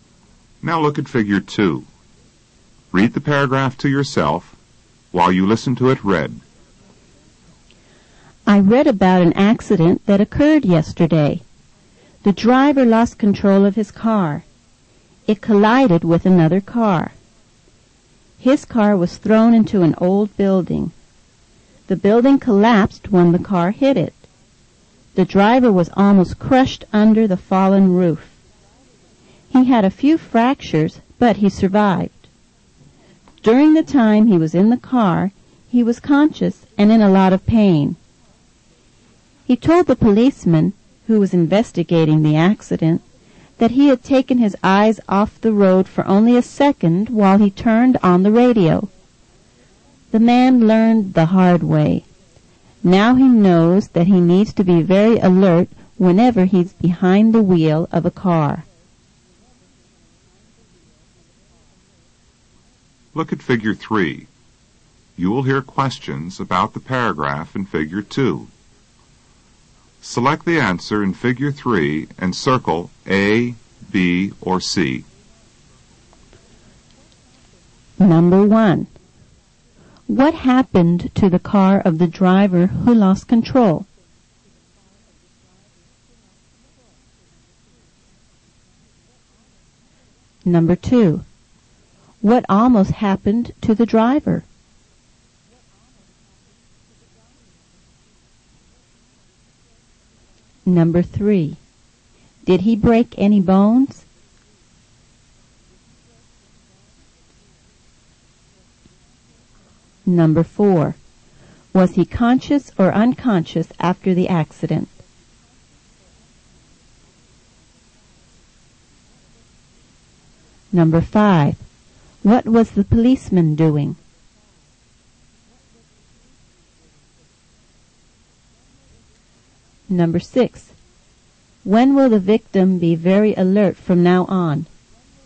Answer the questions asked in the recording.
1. It collided with another car and an old building.
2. He almost got crushed.
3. Yes, he had a few fractures.
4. He was aware.
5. He was conducting an investigation.
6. Whenever he drives his car.